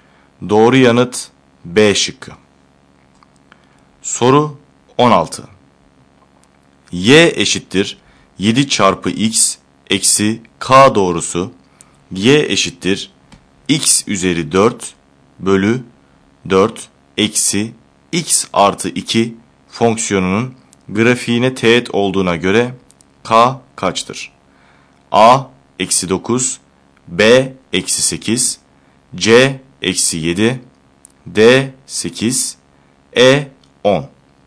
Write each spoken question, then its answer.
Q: Y eşittir 7 çarpı x eksi k doğrusu y eşittir x üzeri 4 bölü 4 eksi x artı 2 fonksiyonunun grafiğine teğet olduğuna göre k kaçtır?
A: Doğru yanıt E şıkkı.